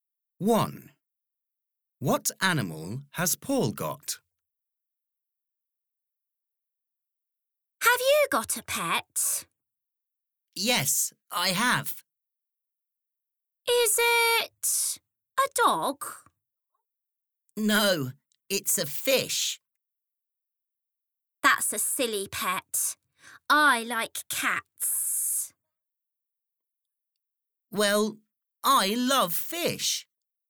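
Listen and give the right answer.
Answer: A fish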